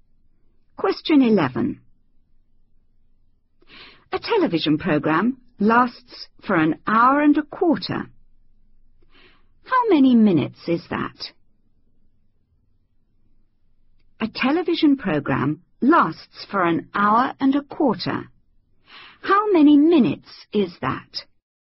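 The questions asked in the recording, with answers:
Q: How many minutes is that?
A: 75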